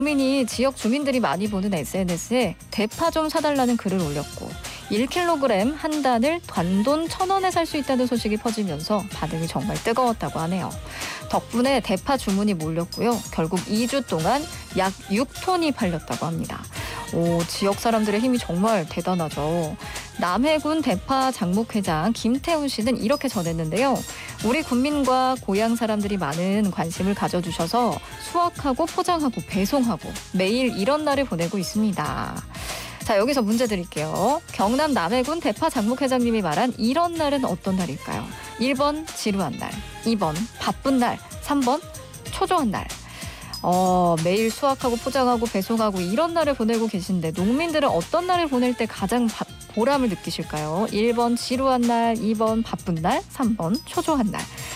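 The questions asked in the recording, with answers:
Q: 경남 남해군 대파 장목회장님이 말한 이런 날은 어떤 날일까요?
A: 2번: 바쁜 날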